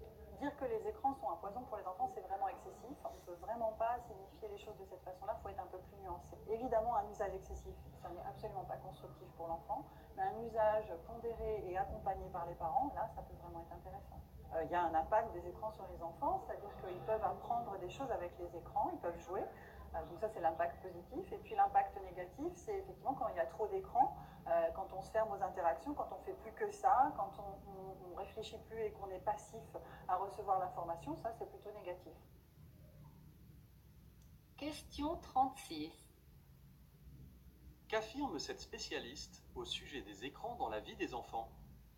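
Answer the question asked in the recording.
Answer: Leur effet dépend de l'usage : excessif, il est négatif ; modéré et accompagné par les parents, il peut être positif.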